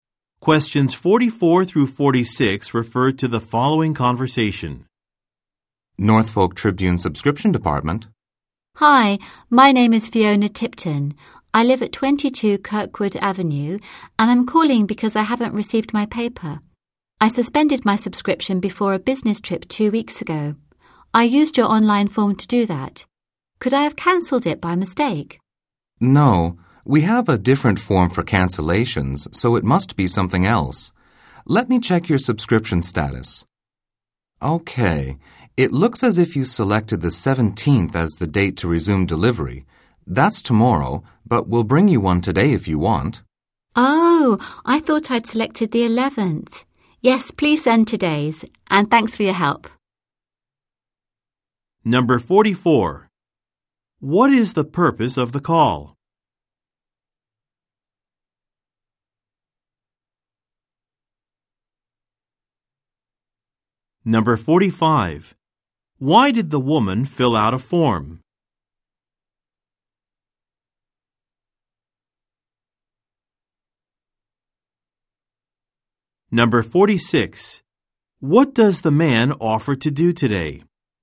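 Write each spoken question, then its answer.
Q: What is the purpose of the call?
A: To report that she hasn't received her newspaper

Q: Why did the woman fill out a form?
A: To suspend her subscription during a business trip

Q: What does the man offer to do today?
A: Deliver today's newspaper to her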